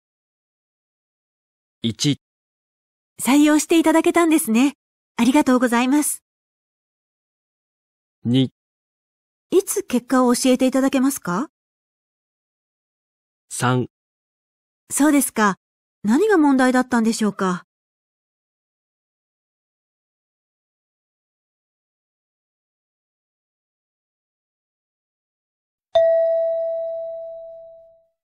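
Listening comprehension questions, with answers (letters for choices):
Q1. 男:この間出してくれた新商品なんだけど、検討の結果、見送ることになったよ。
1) 採用していただけたんですね。ありがとうございます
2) いつ結果を教えていただけますか?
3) そうですか。何が問題だったんでしょうか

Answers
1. 3

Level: 【N2 第2回】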